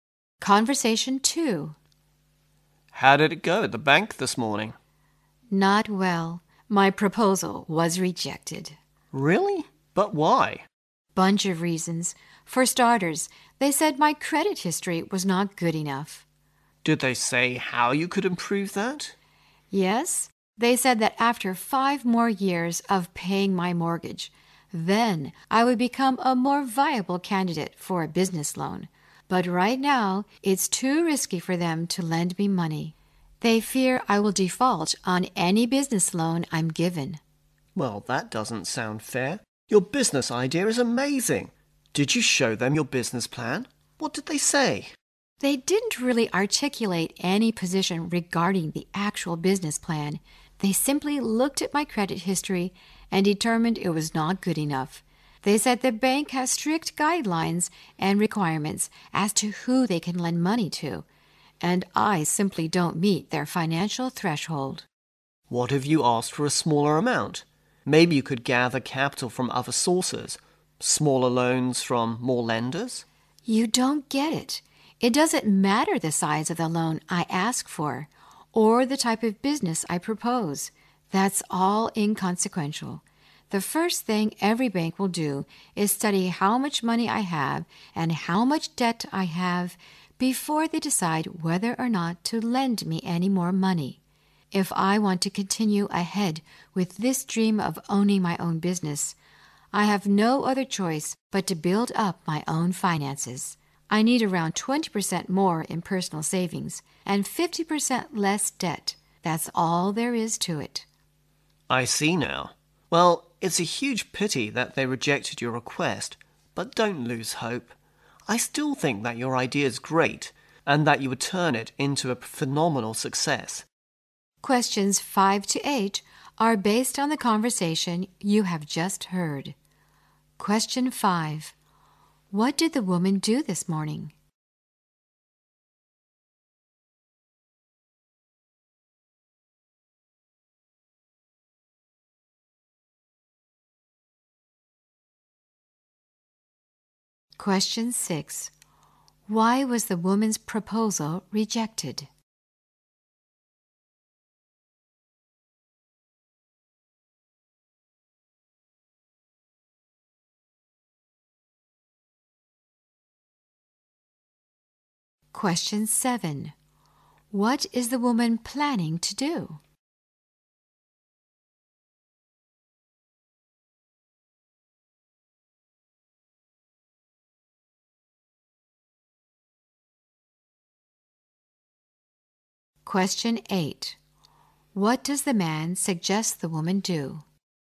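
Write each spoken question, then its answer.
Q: What did the woman do this morning?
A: She went to the bank to apply for a business loan.

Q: Why was the woman's proposal rejected?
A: Her credit history was not good enough.

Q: What is the woman planning to do?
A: Build up her own finances: save more and cut her debt.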